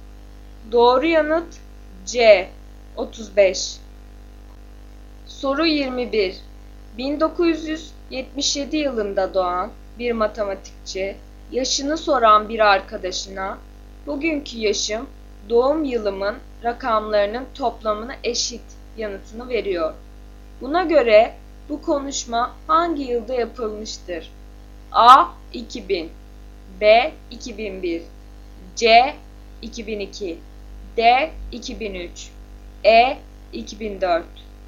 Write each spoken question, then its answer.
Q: Buna göre bu konuşma hangi yılda yapılmıştır?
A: Doğru yanıt B 2001.